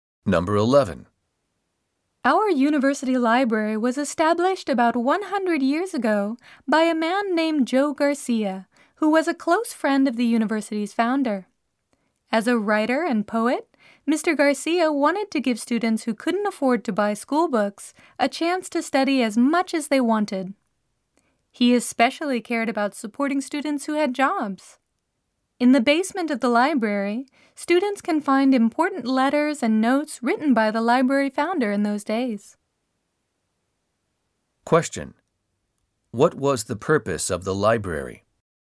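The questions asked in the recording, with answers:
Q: What was the purpose of the library?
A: To let students who couldn't afford school books study as much as they wanted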